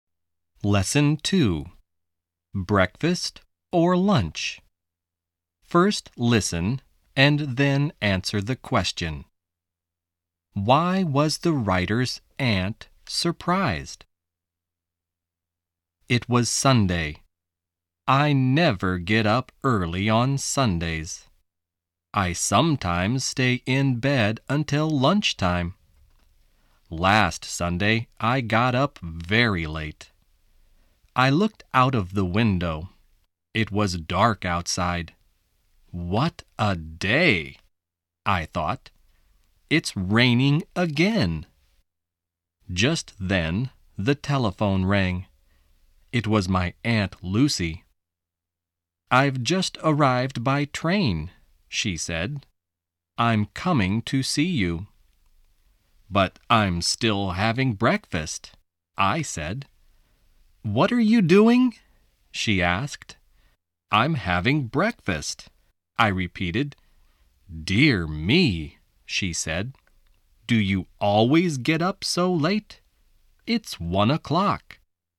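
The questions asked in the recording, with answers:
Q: Why was the writer's aunt surprised?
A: Because the writer was still having breakfast at 1 o'clock.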